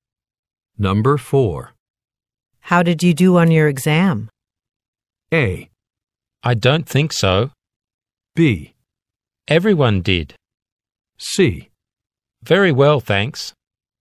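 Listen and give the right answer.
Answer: C: Very well, thanks.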